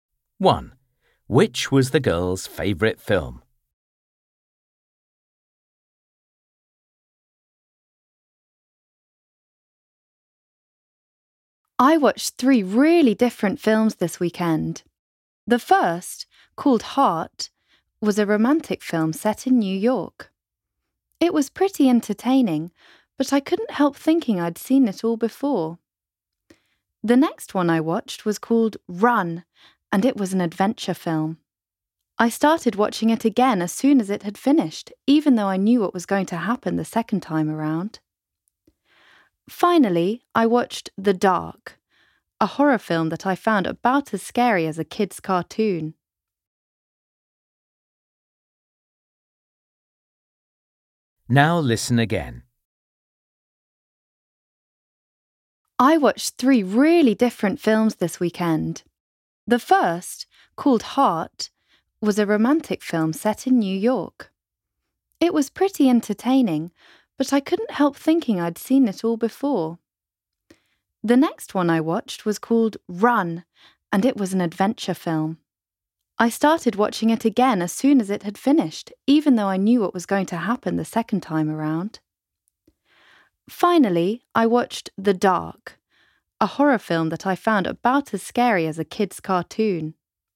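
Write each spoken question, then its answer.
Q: Which was the girl's favourite film?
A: Run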